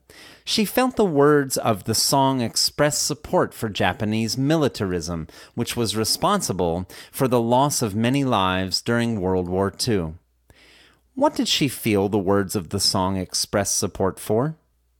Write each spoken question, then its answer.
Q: What did she feel the words of the song expressed support for?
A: She felt the words of the song expressed support for Japanese militarism.